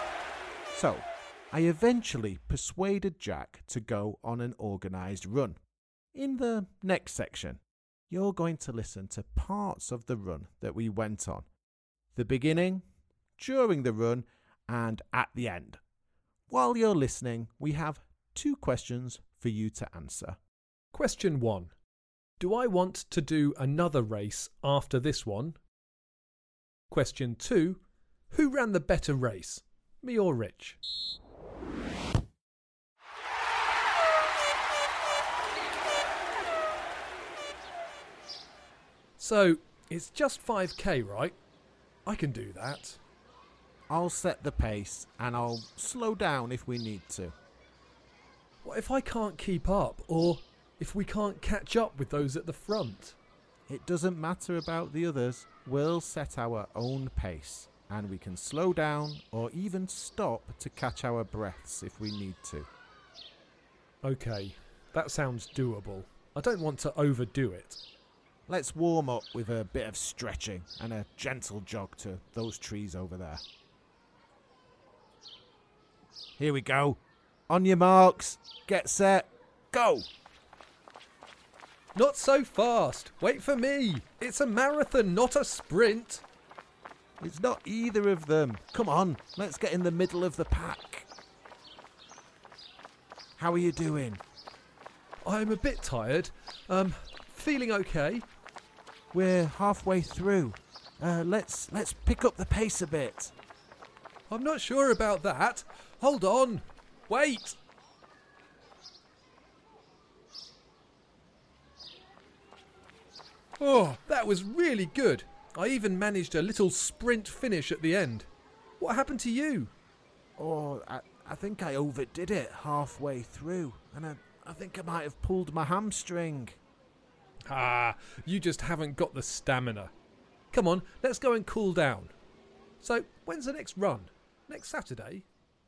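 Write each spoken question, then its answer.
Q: Who ran the better race, me or Rich?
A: Rich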